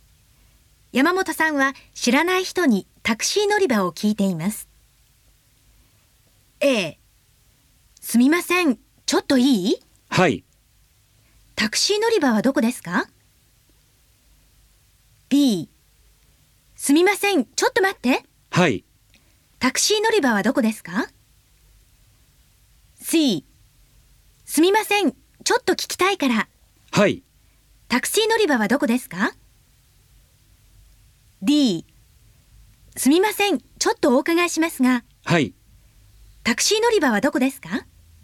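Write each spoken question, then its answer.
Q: 山本さんは知らない人にタクシー乗り場を聞いています。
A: D: すみません、ちょっとお伺いしますが。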